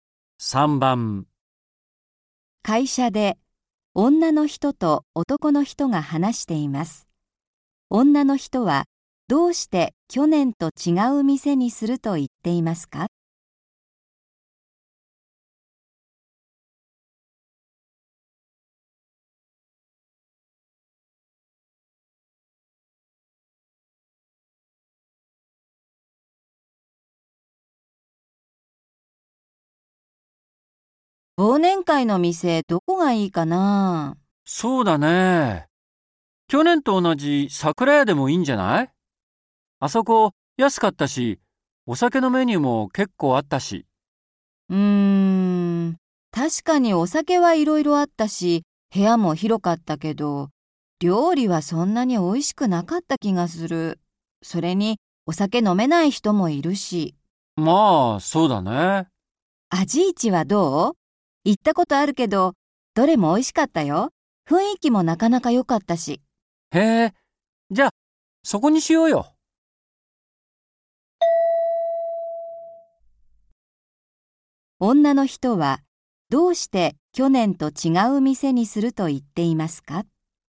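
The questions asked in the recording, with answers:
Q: 女の人はどうして去年と違う店にすると言っていますか?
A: 去年の店(桜屋)は料理があまり美味しくなかったから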